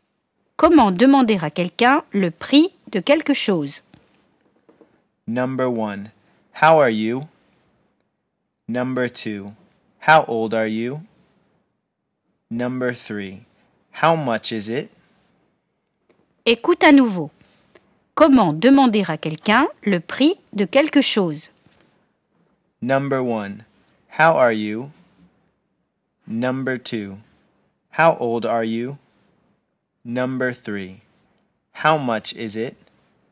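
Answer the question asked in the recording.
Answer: 3: How much is it?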